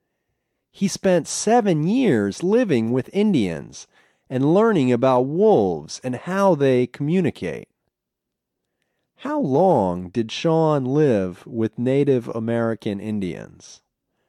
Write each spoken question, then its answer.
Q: How long did Sean live with Native American Indians?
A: He lived with them for 7 years.